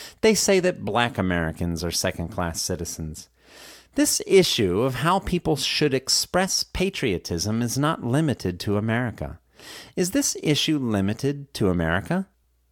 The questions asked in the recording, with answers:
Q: Is this issue limited to America?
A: No, this issue is not limited to America.